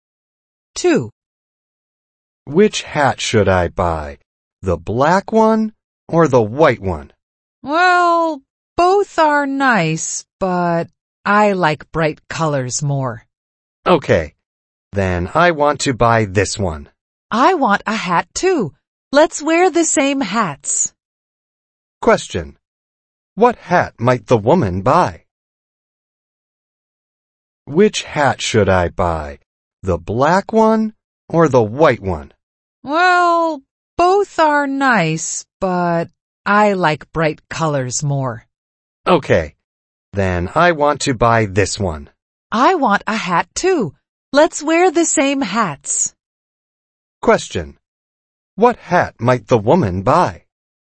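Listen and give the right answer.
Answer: The white one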